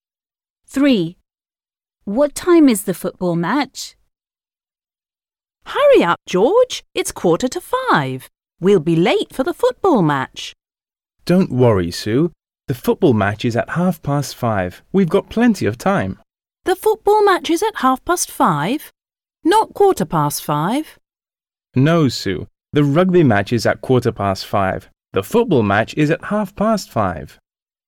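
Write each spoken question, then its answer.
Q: What time is the football match?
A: 5:30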